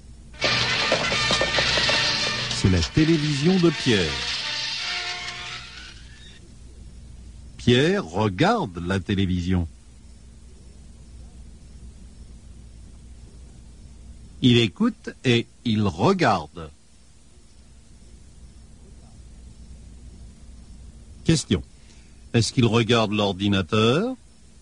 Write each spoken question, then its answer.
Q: Est-ce qu'il regarde l'ordinateur?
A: Non, il ne regarde pas l'ordinateur.